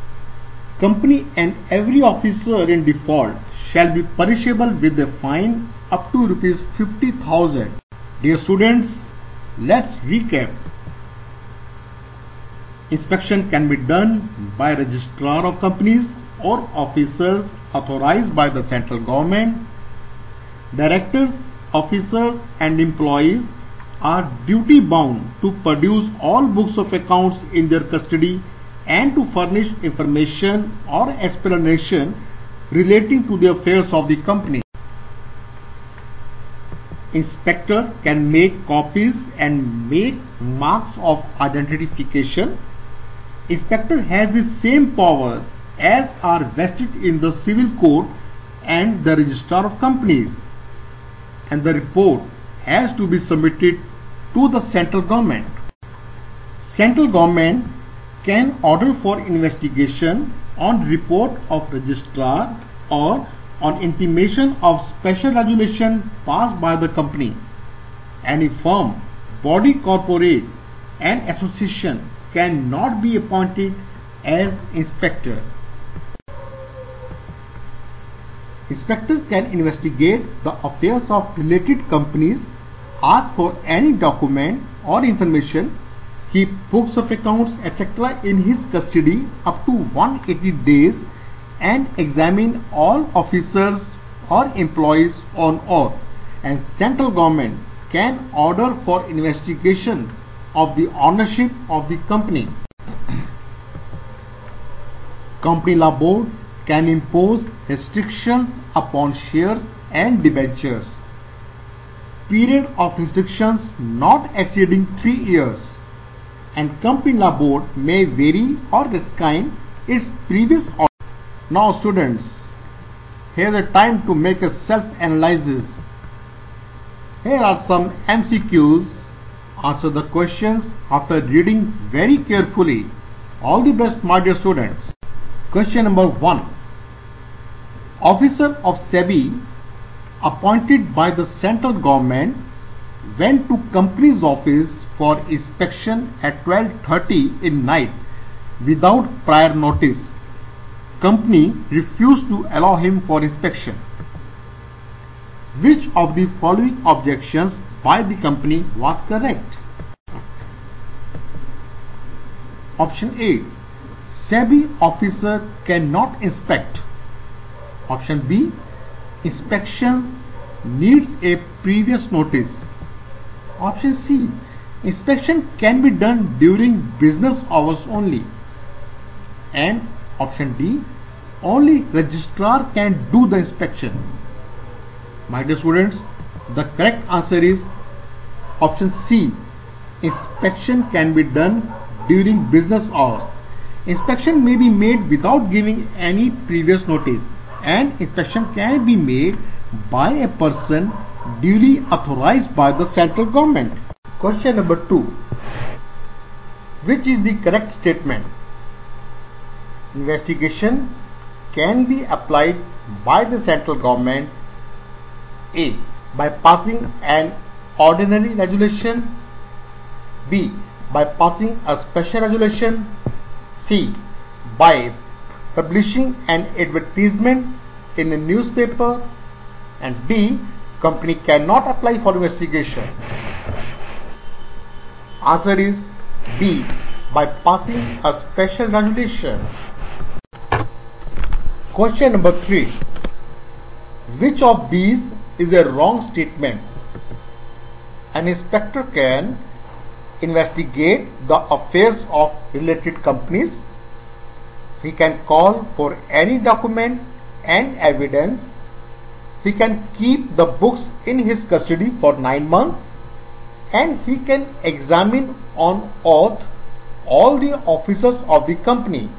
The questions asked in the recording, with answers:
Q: Which of the following objections by the company was correct?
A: My dear students, the correct answer is option C.

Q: Which is the correct statement?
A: Answer is B. By passing a special regulation.

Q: Which of these is a wrong statement?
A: The correct answer is C. This is the wrong statement, that he can keep the books in his custody for 9 months.